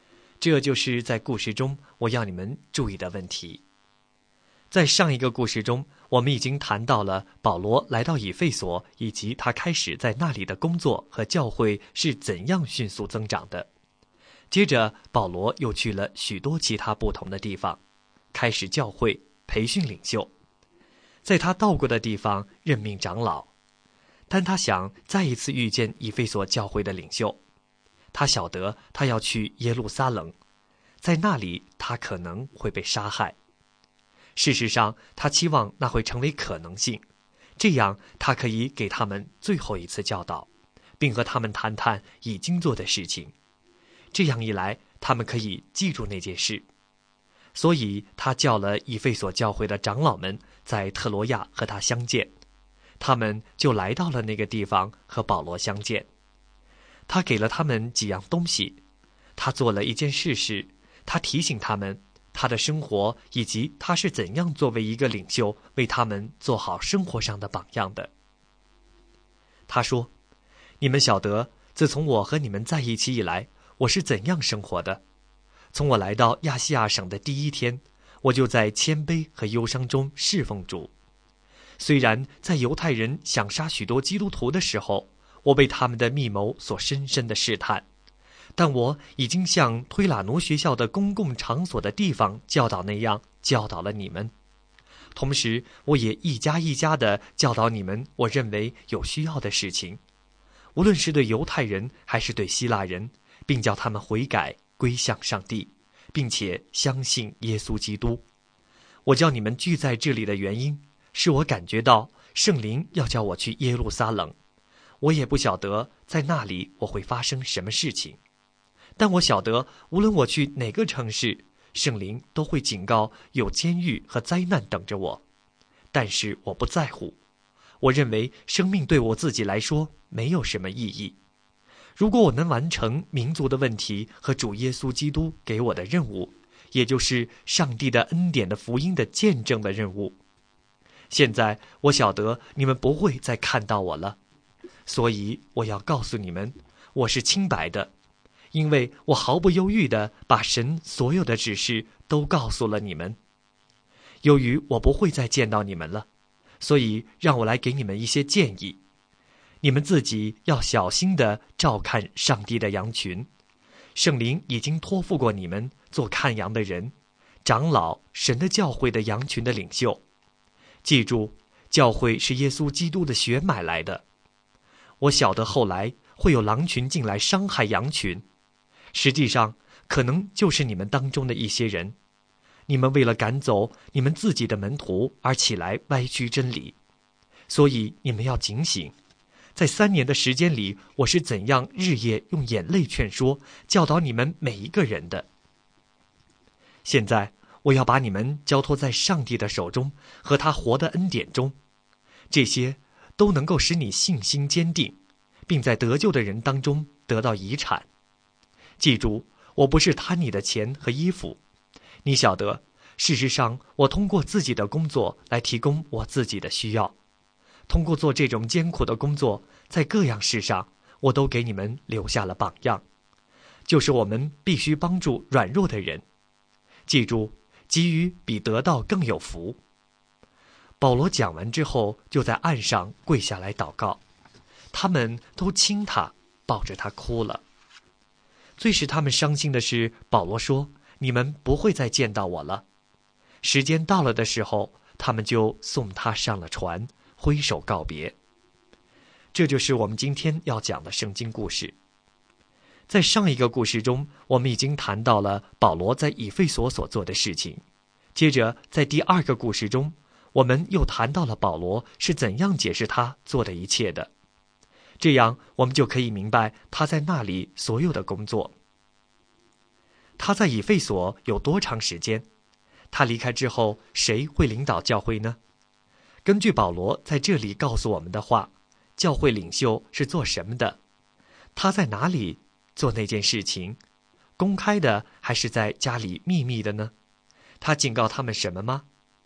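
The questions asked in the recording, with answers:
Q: 他在以弗所有多长时间?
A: 三年

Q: 他离开之后,谁会领导教会呢?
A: 以弗所教会的长老们

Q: 根据保罗在这里告诉我们的话,教会领袖是做什么的?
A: 照看上帝的羊群(教会)

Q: 他在哪里做那件事情?公开的还是在家里秘密的呢?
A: 两者都有:在公共场所,也一家一家地教导

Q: 他警告他们什么吗?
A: 会有狼群进来伤害羊群,有人会起来歪曲真理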